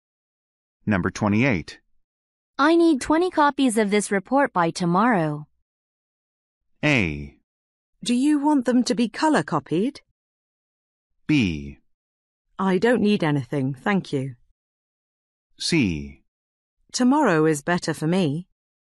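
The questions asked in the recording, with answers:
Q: I need 20 copies of this report by tomorrow.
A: A: Do you want them to be color copied?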